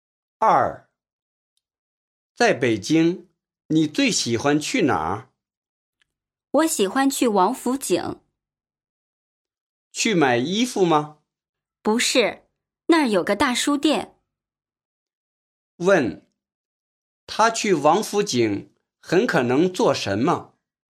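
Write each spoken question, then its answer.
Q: 他去王府井很可能做什么?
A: 买书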